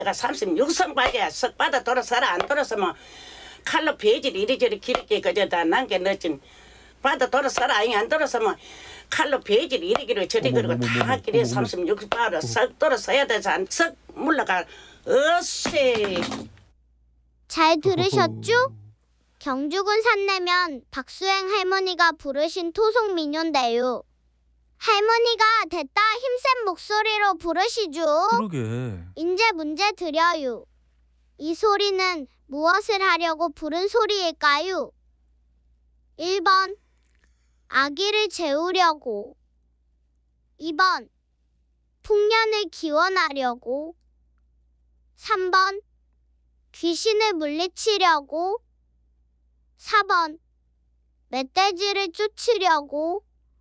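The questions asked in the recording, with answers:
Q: 이 소리는 무엇을 하려고 부른 소리일까요?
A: 3: 귀신을 물리치려고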